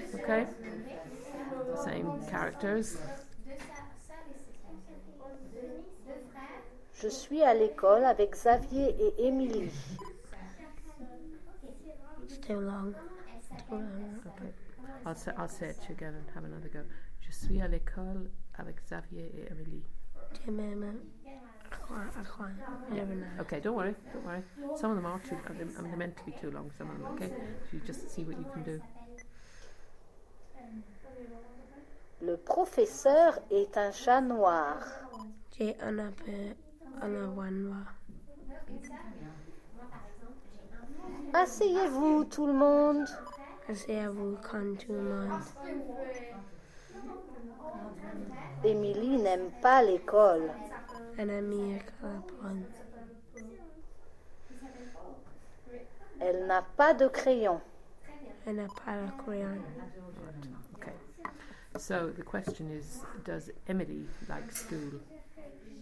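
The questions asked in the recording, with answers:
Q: does Emily like school?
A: No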